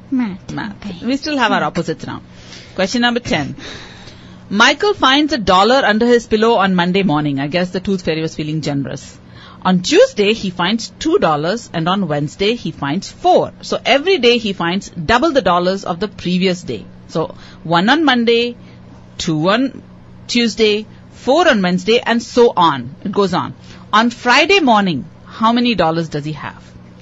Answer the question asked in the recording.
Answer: 31 is right.